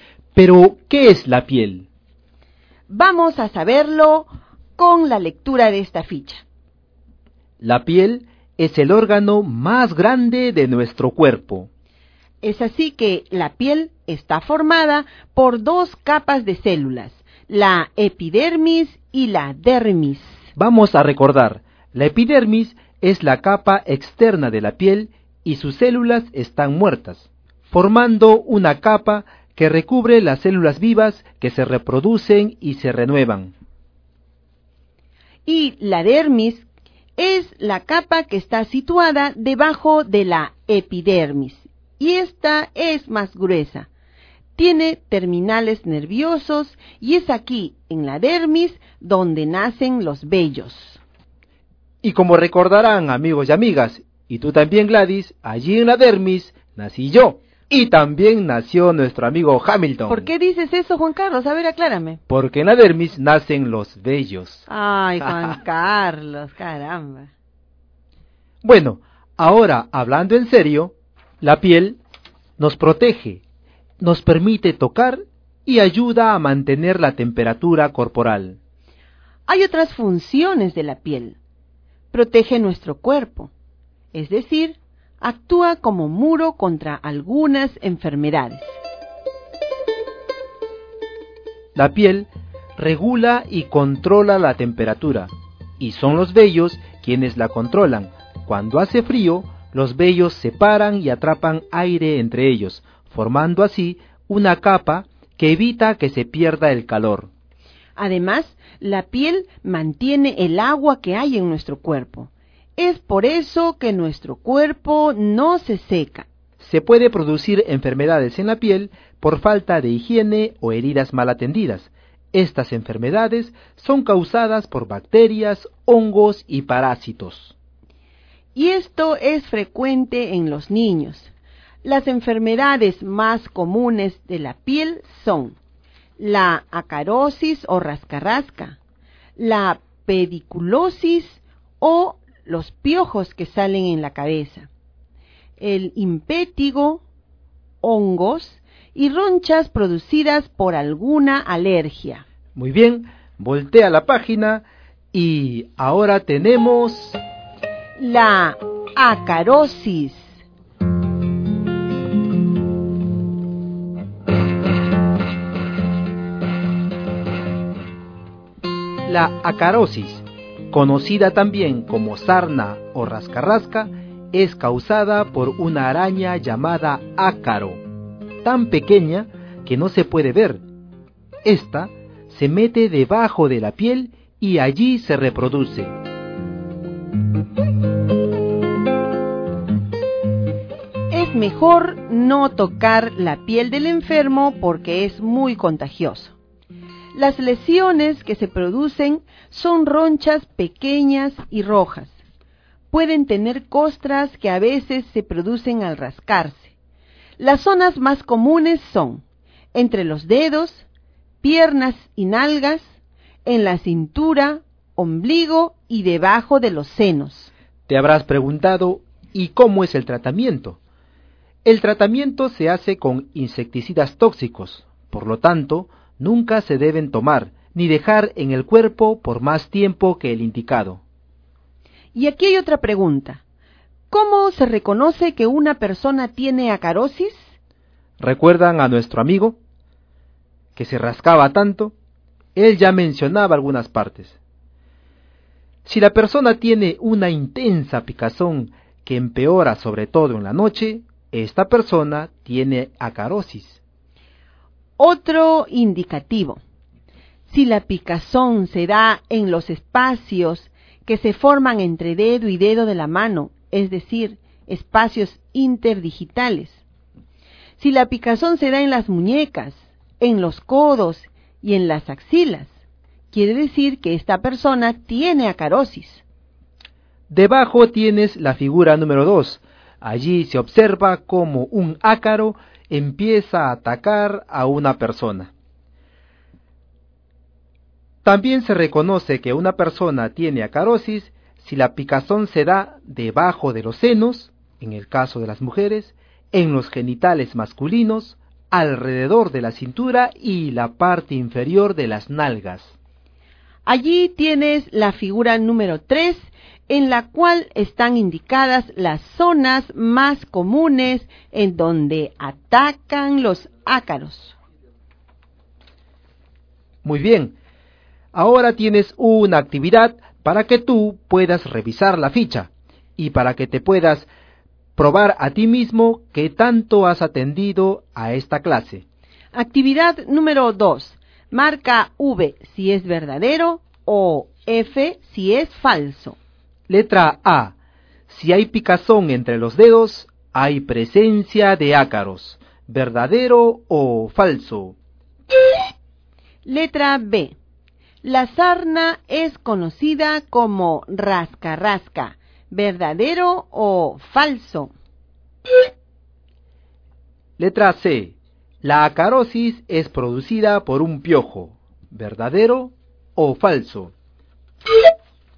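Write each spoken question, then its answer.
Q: Si hay picazón entre los dedos, hay presencia de ácaros. ¿Verdadero o falso?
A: Verdadero

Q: La sarna es conocida como rascarrasca. ¿Verdadero o falso?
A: Verdadero

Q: La acarosis es producida por un piojo. ¿Verdadero o falso?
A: recuerden amigos que la acarosis no es producida por un piojo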